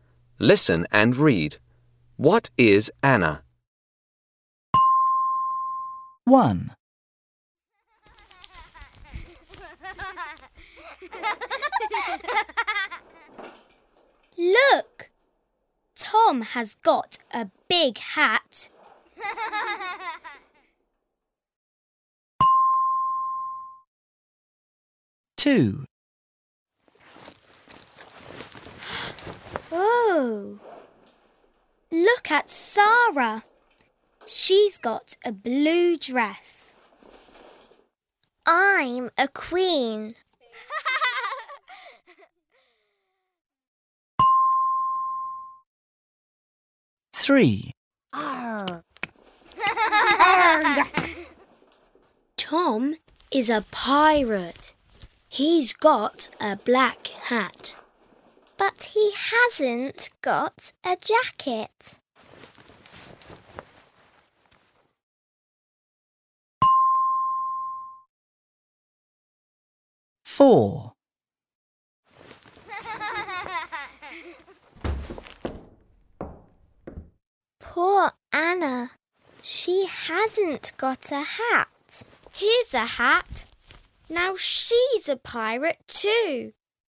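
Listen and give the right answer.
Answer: a pirate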